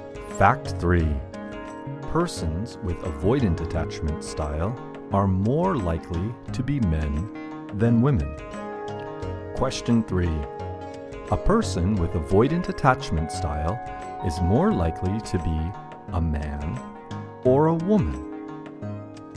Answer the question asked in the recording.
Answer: Persons with avoidant attachment style are more likely to be men than women.